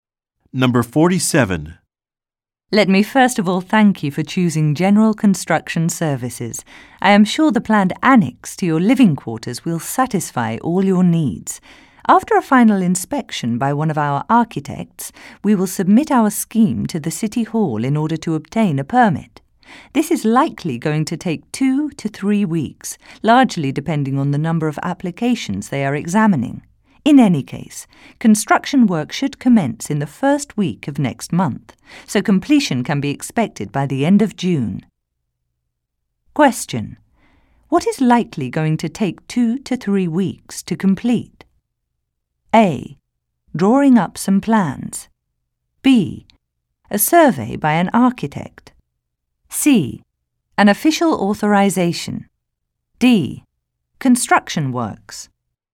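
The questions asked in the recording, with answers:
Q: what is likely going to take 2 to 3 weeks to complete?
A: C: An official authorization.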